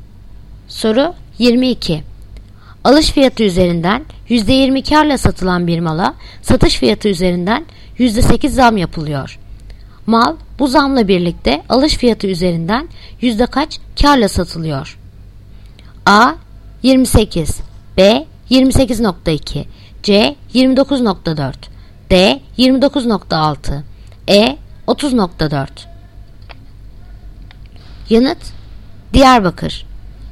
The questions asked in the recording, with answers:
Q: Mal bu zamla birlikte alış fiyatı üzerinden yüzde kaç karla satılıyor?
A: Yanıt Diyarbakır. 29.6.